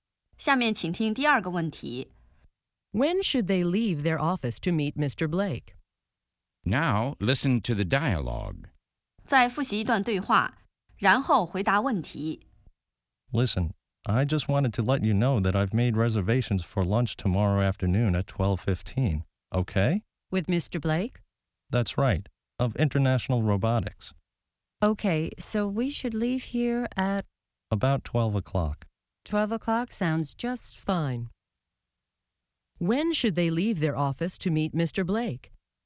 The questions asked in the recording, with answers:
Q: When should they leave their office to meet Mr. Blake?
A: They should leave their office at 12 o'clock.